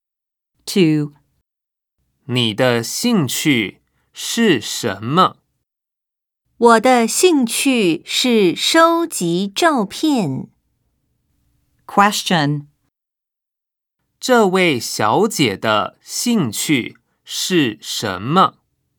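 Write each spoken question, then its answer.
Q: 这位小姐的兴趣是什么?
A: 收集照片。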